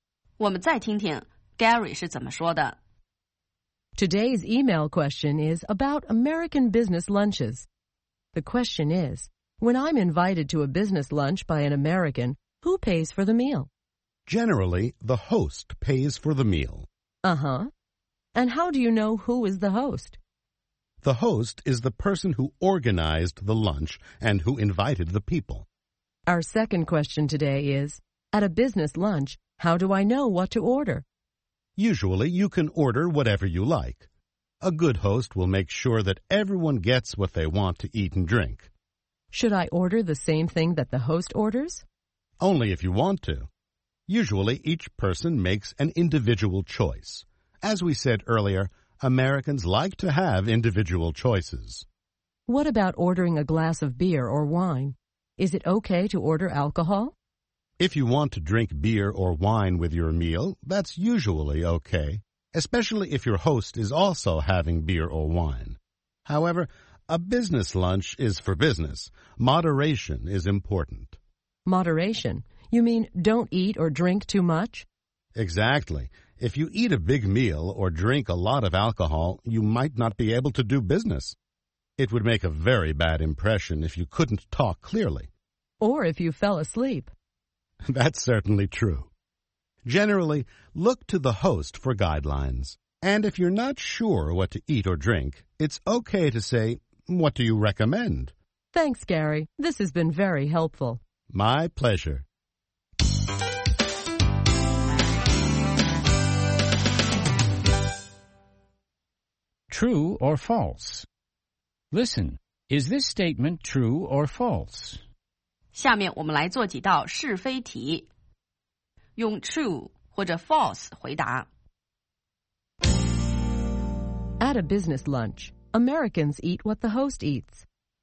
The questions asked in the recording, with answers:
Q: At a business lunch, Americans eat what the host eats.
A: False. Americans eat whatever they want to eat.